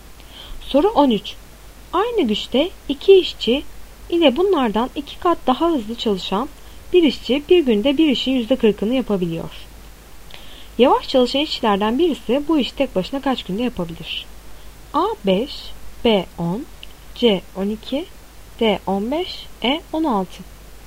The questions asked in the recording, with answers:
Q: Yavaş çalışan işçilerden birisi bu işi tek başına kaç günde yapabilir?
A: Doğru cevap B 10.